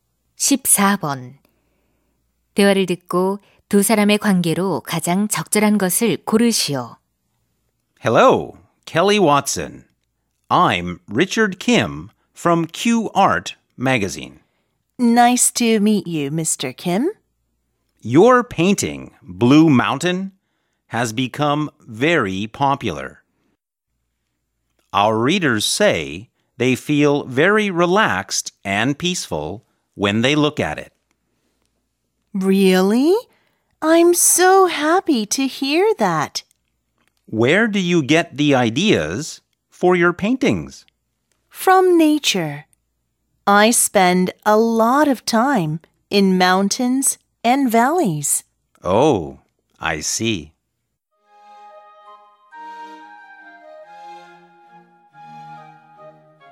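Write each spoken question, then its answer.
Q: 대화를 듣고 두 사람의 관계로 가장 적절한 것을 고르시오.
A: 기자와 화가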